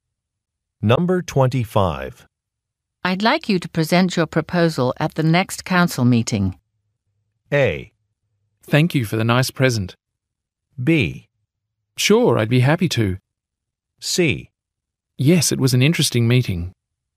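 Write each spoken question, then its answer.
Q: I'd like you to present your proposal at the next council meeting.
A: B: Sure, I'd be happy to.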